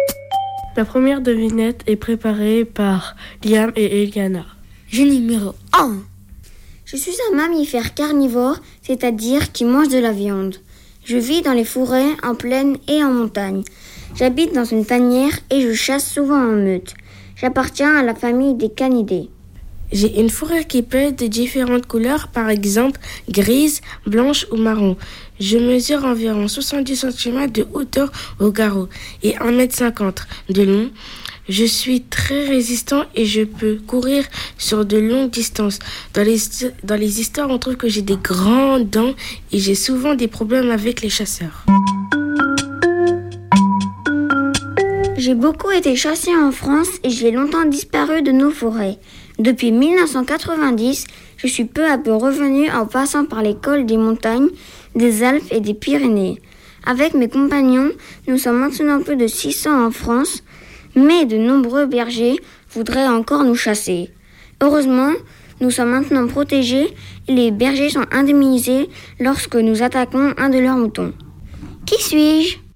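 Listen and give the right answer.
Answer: le loup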